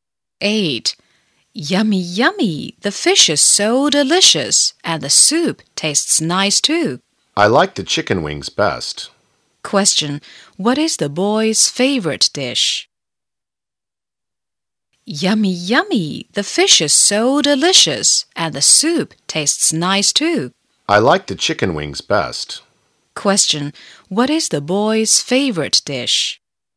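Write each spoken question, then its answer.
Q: What is the boy's favorite dish?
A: Chicken wings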